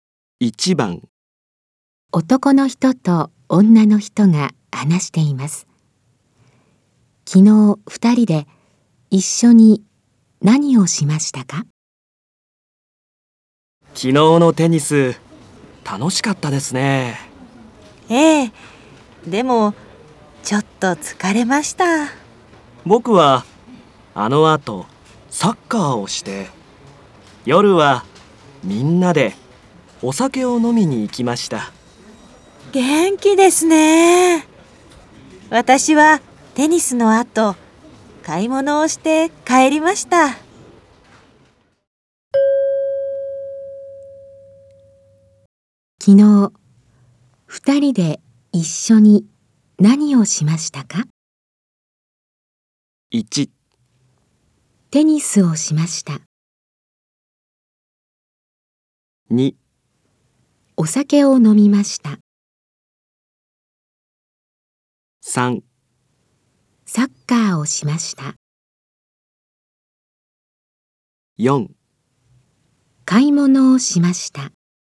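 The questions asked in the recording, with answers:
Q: 昨日二人で一緒に何をしましたか?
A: 1: テニスをしました。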